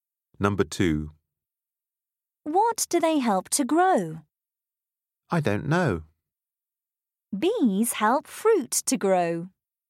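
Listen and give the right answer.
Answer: fruit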